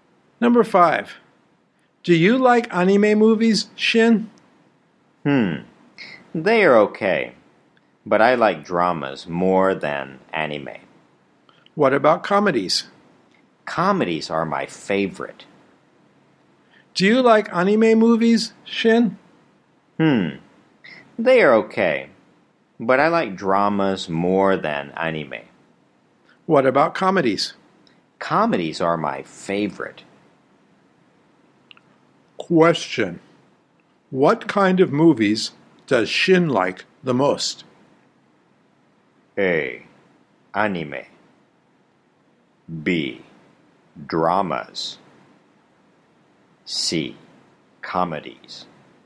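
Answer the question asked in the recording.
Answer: C: Comedies.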